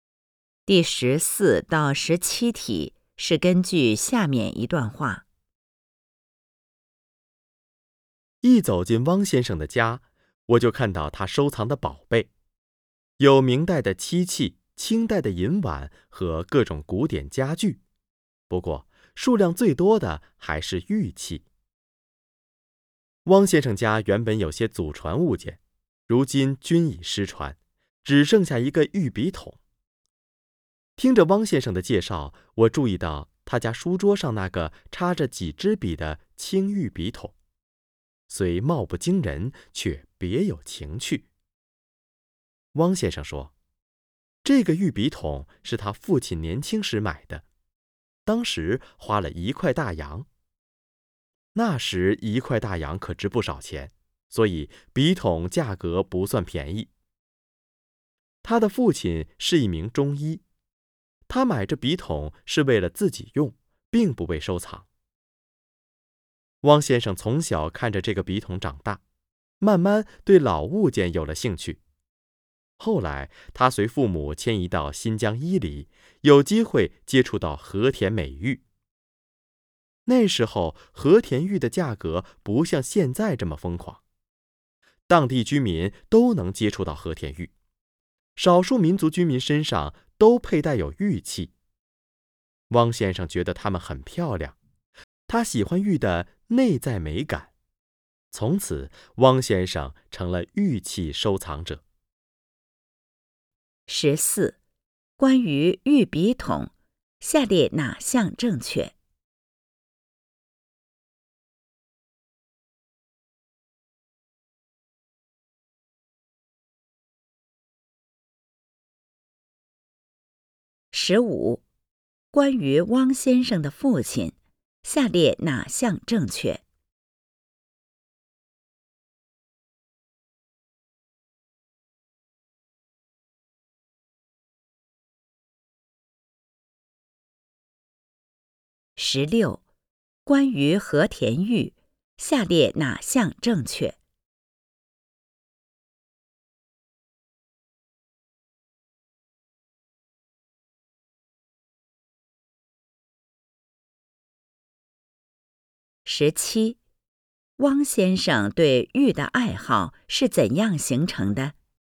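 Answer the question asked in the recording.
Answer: 从小看着玉笔筒长大,后来在新疆伊犁接触和田玉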